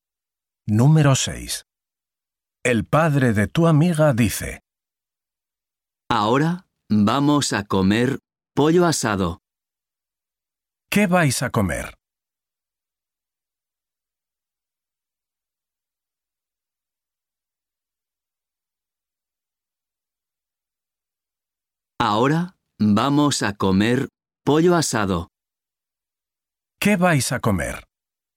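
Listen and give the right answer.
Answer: pollo asado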